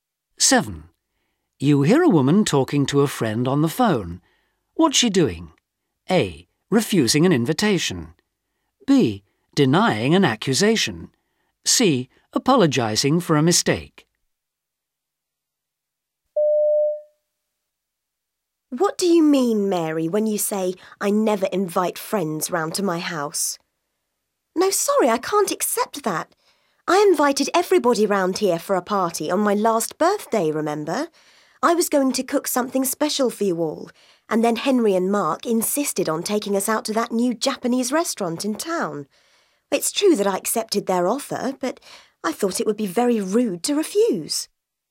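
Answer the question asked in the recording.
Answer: B: Denying an accusation.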